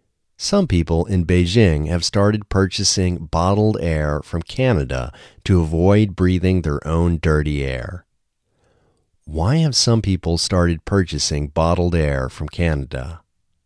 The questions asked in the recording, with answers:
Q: Why have some people started purchasing bottled air from Canada?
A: Some people have started purchasing bottled air from Canada to avoid breathing their own dirty air.